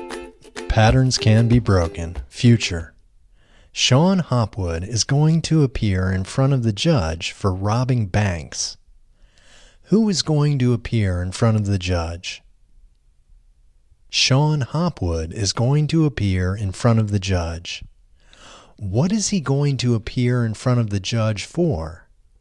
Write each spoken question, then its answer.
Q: Who is going to appear in front of the judge?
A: Sean Hopwood is going to appear in front of the judge.

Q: What is he going to appear in front of the judge for?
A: He is going to appear in front of the judge for robbing banks.